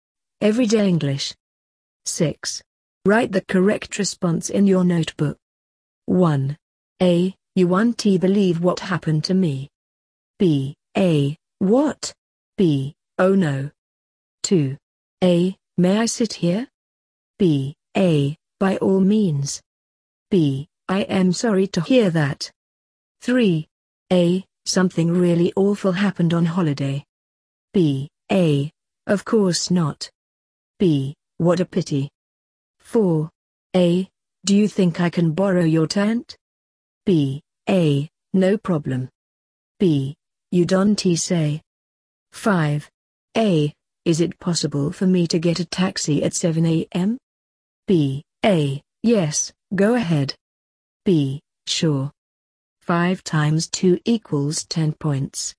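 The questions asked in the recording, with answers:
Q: A. You won't believe what happened to me.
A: A: What?

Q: May I sit here?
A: A: By all means.

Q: A. Do you think I can borrow your tent?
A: A: No problem.

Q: A. Is it possible for me to get a taxi at 7 a.m.?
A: B: Sure.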